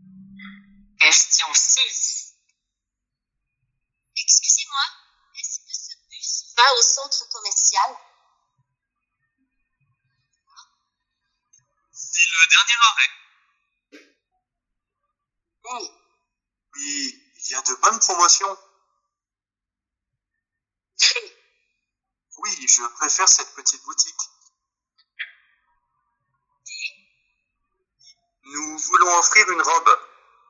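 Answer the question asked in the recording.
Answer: A: C'est le dernier arrêt.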